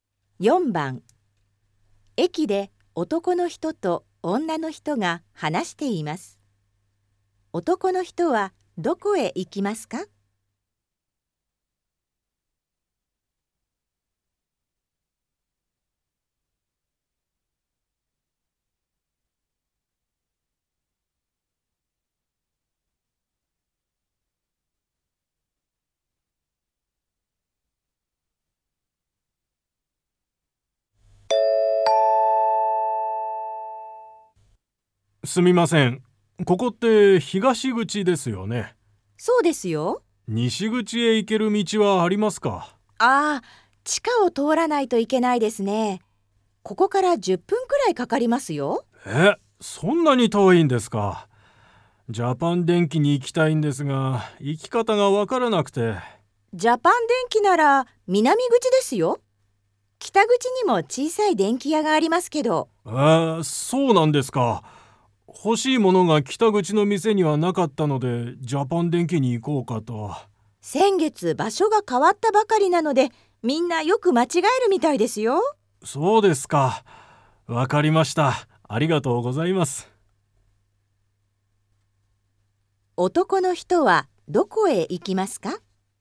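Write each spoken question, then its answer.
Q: 男の人はどこへ行きますか?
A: 南口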